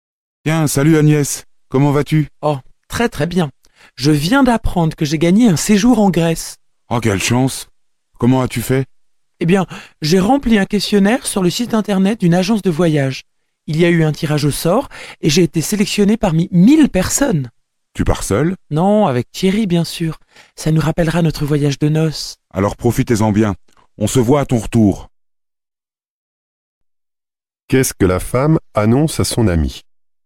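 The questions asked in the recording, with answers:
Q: Qu'est-ce que la femme annonce à son ami ?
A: Elle a gagné un séjour en Grèce.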